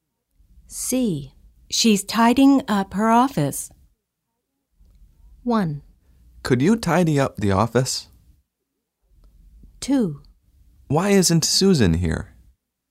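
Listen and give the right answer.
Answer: 2: Why isn't Susan here?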